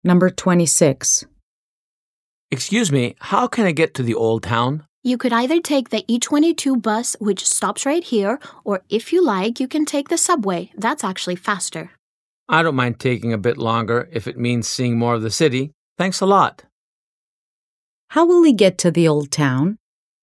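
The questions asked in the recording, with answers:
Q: How will he get to the Old Town?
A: By the E22 bus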